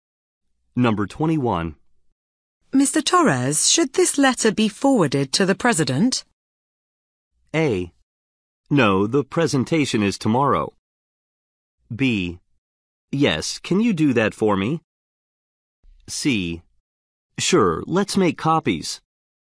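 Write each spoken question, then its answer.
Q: Mr. Torres, should this letter be forwarded to the president?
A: B: Yes, can you do that for me?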